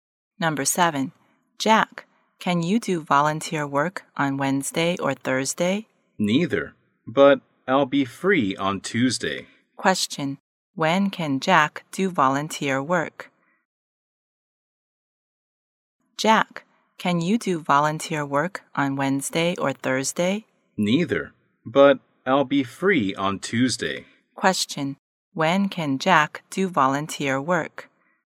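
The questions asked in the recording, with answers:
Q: When can Jack do volunteer work?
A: On Tuesday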